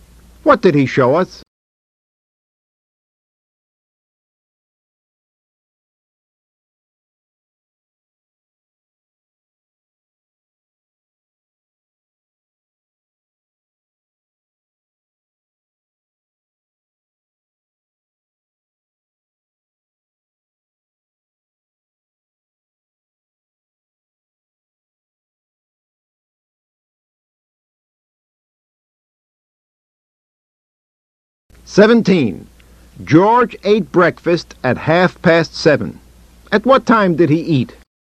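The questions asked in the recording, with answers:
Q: At what time did he eat?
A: At 7:30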